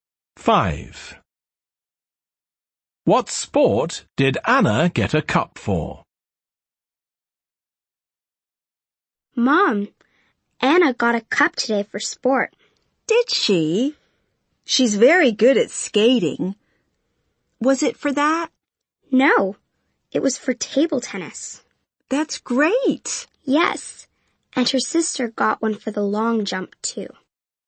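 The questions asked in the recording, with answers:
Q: What sport did Anna get a cup for?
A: Table tennis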